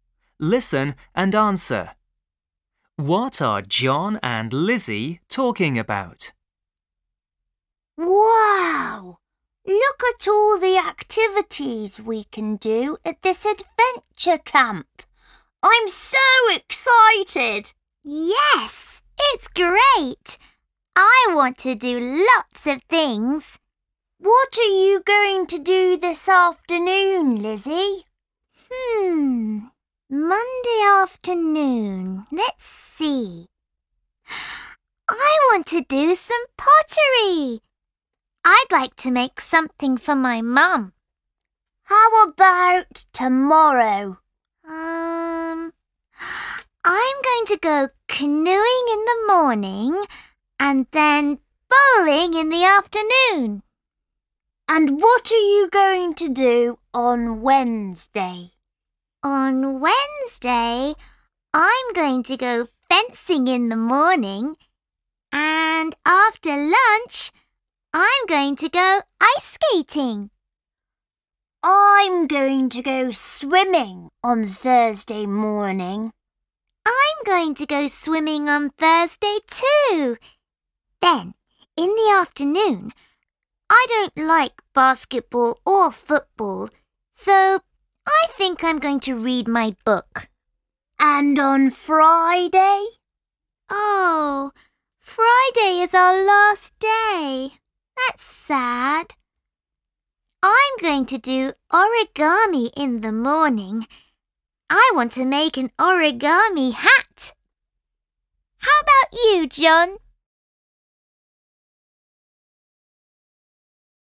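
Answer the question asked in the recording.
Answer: The activities they are going to do at the adventure camp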